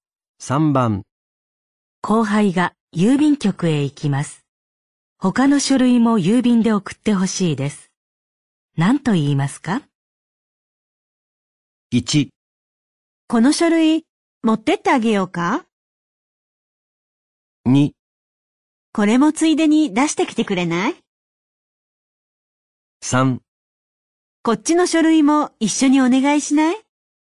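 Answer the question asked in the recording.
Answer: 2: これもついでに出してきてくれない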